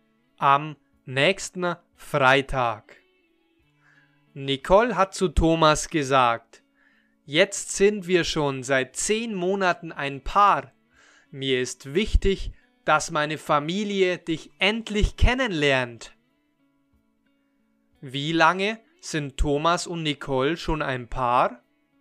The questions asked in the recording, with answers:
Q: Wie lange sind Thomas und Nicole schon ein Paar?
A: Seit zehn Monaten. Sie sind schon seit zehn Monaten ein Paar.